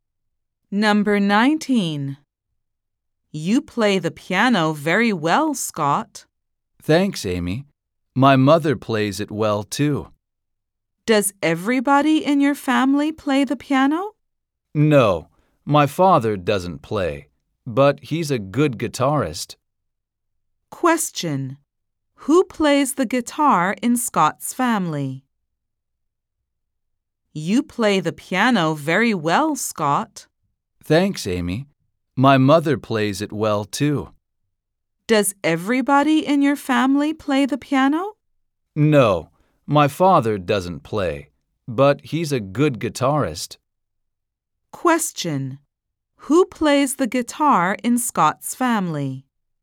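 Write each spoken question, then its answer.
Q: Who plays the guitar in Scott's family?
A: His father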